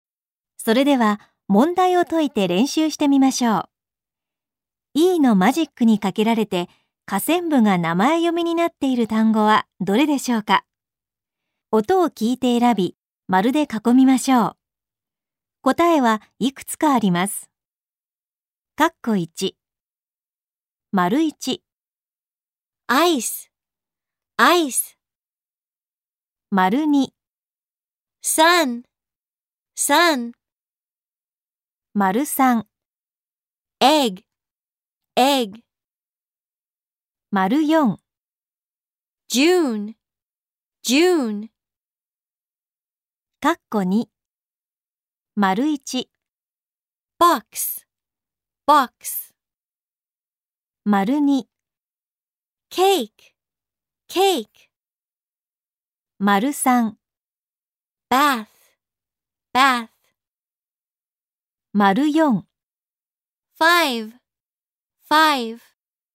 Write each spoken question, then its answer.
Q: E のマジックにかけられて下線部が名前読みになっている単語はどれでしょうか。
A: 名前読みになっているのは、丸1のアイスと丸4のジューンです。

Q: E のマジックにかけられて下線部が名前読みになっている単語はどれでしょうか。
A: 名前読みになっているのは、丸二のケーキ。